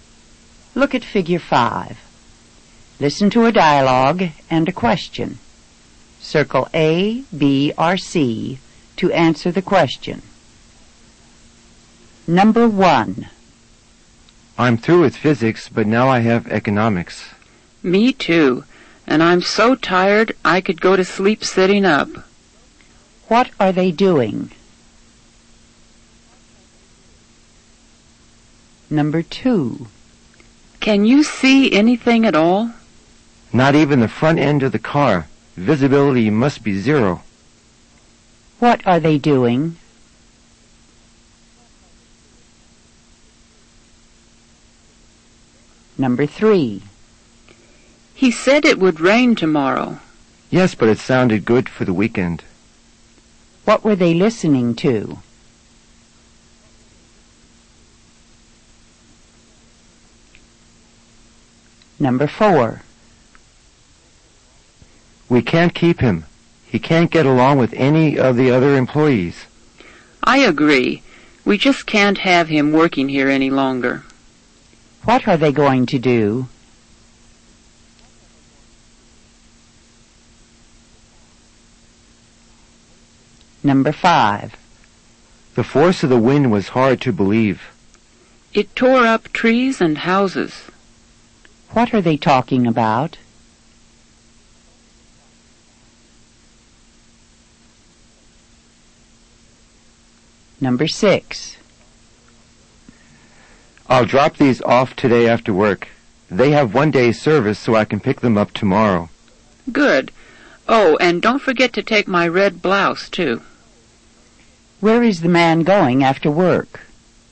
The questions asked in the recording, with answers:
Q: What are they doing?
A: Number 1 is A. They are studying.

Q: What are they doing?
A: Number 2 is C. They are driving in the fog.

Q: What were they listening to?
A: Number 3 is C. They were listening to the weather forecast.

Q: What are they going to do?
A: Number 4 is B. They are going to fire him from the job.

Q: What are they talking about?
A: Number 5 is A. They are talking about a tornado.

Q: Where is the man going after work?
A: Number 6 is C. The man is going to the cleaners after work.